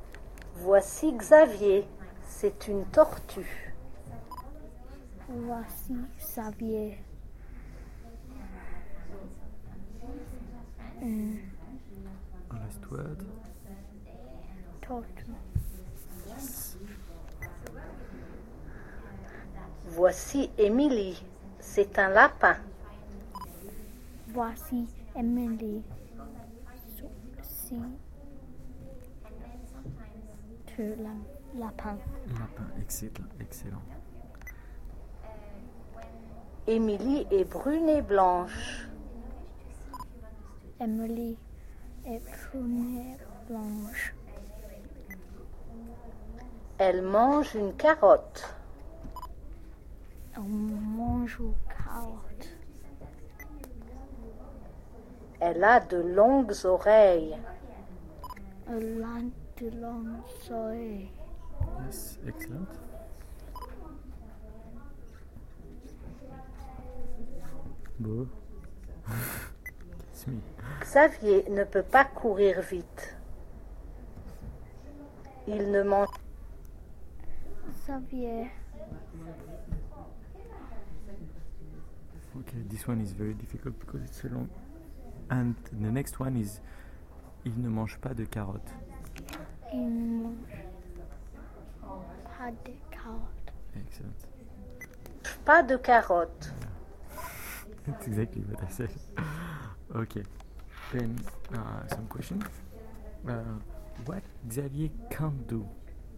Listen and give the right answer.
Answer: Il ne peut pas courir vite, he can't run.